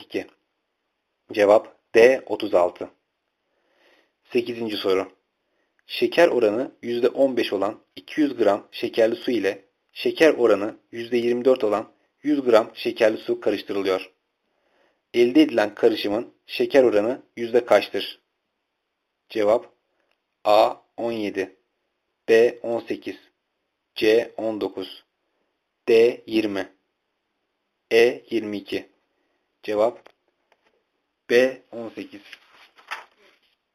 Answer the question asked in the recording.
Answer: Cevap B. 18.